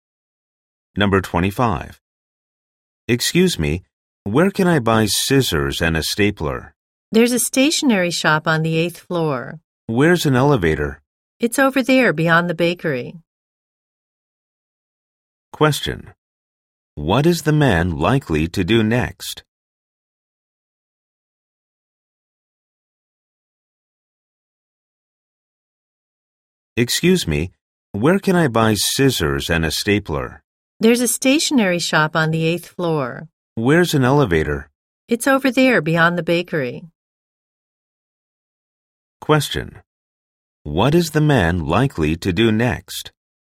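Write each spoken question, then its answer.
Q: What is the man likely to do next?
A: Take the elevator to the stationery shop on the 8th floor.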